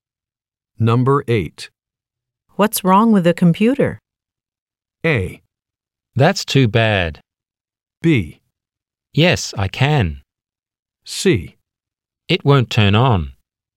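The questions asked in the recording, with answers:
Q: What's wrong with the computer?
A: C: It won't turn on.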